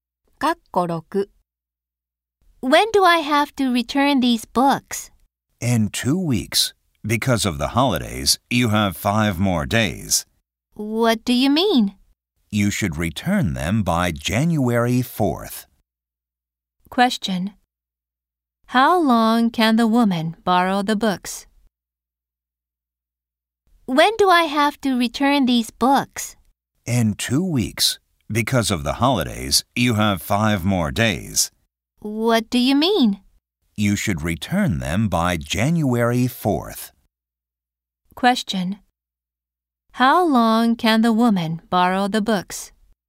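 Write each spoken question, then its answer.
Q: How long can the woman borrow the books?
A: 2 weeks and 5 days (19 days)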